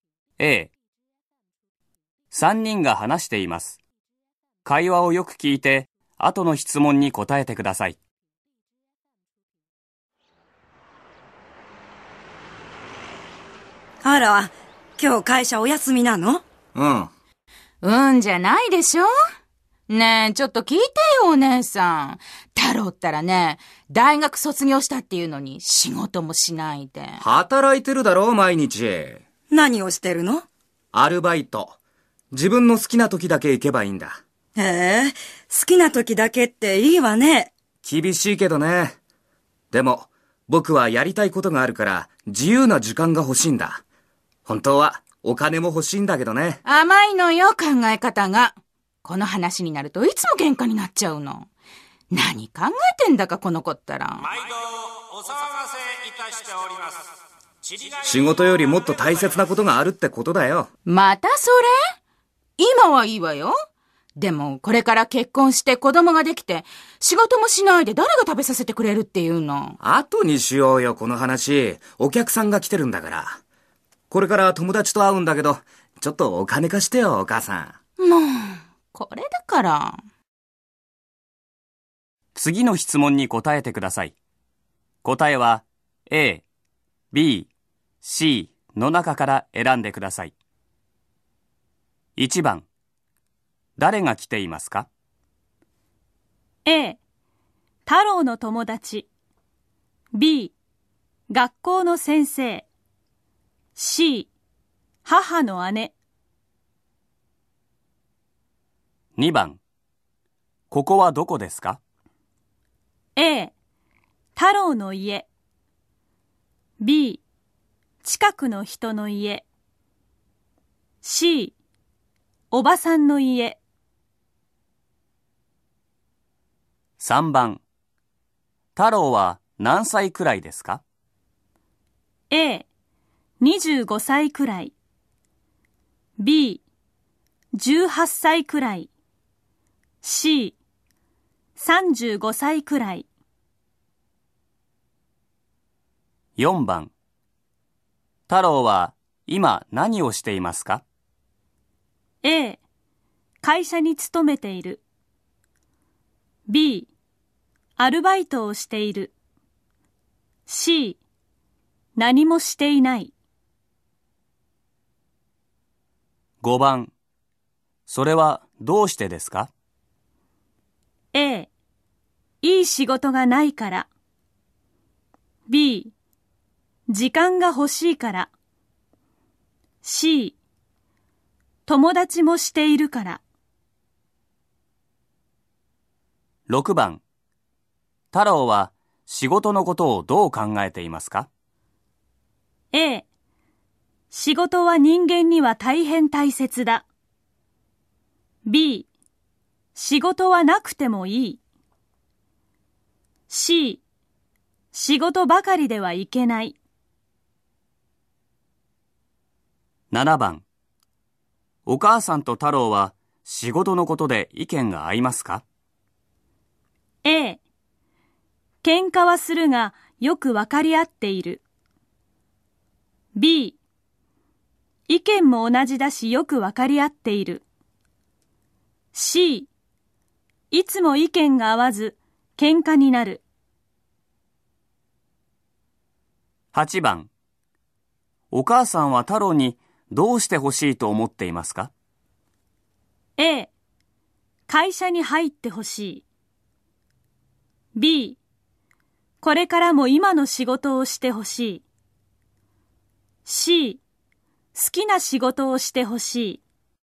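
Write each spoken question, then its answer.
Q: 誰が来ていますか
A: C: 母の姉

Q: ここはどこですか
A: A: 太郎の家

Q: 太郎は今何をしていますか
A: B: アルバイトをしている

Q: それはどうしてですか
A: B: 時間が欲しいから

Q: 太郎は仕事のことをどう考えていますか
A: C: 仕事ばかりではいけない

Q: お母さんと太郎は仕事のことで意見が合いますか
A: C: いつも意見が合わず喧嘩になる

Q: お母さんは太郎にどうしてほしいと思っていますか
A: A: 会社に入ってほしい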